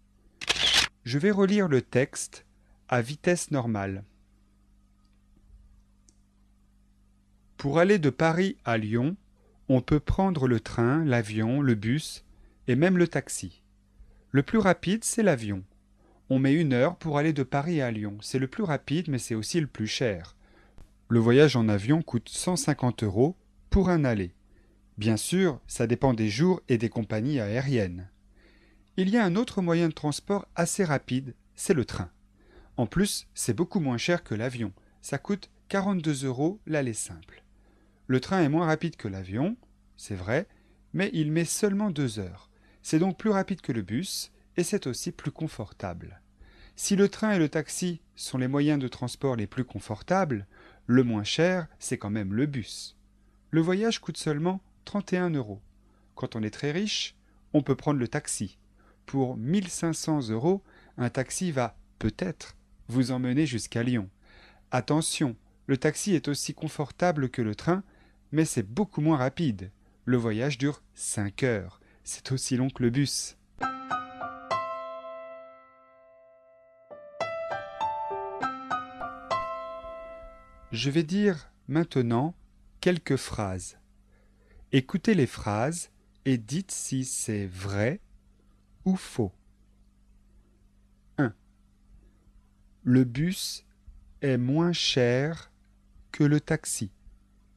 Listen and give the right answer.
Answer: C'est vrai.